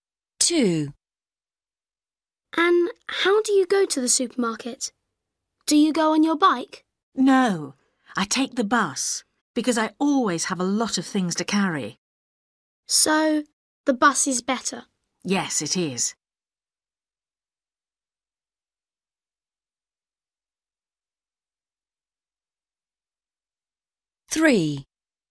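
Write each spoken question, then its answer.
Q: And how do you go to the supermarket?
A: by bus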